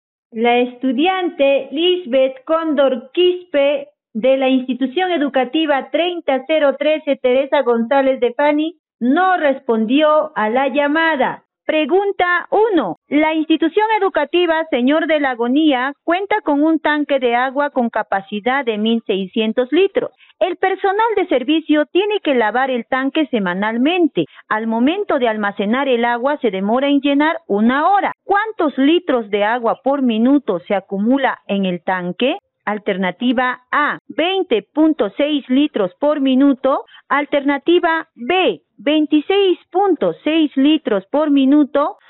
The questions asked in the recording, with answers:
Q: ¿Cuántos litros de agua por minuto se acumula en el tanque?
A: La alternativa B.